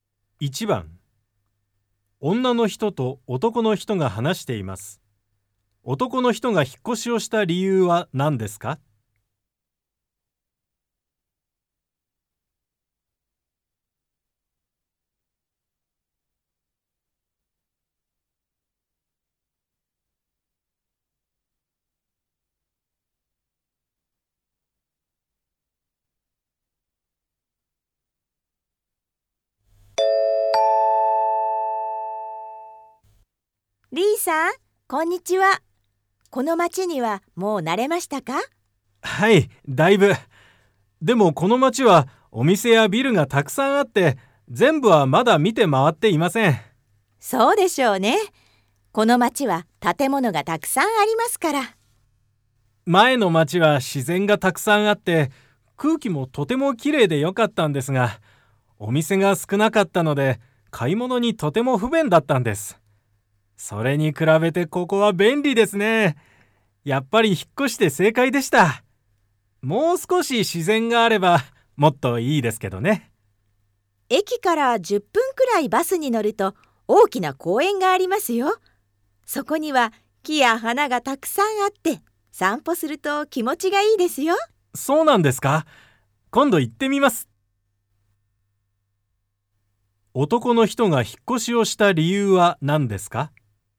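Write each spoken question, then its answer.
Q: 男の人が引っ越しをした理由は何ですか?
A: 前の町はお店が少なく、買い物に不便だったから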